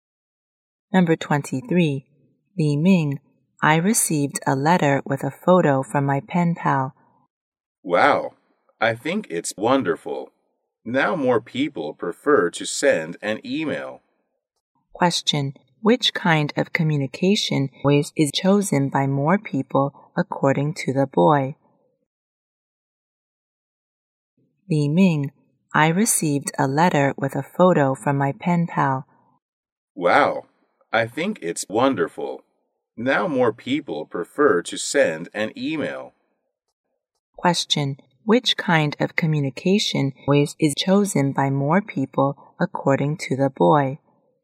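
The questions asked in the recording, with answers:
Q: Which kind of communication is chosen by more people according to the boy?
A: Sending an email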